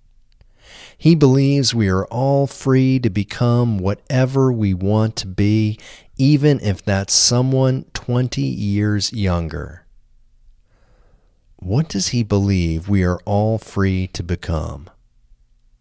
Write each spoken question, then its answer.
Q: What does he believe we are all free to become?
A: He believes we are all free to become whatever we want to be.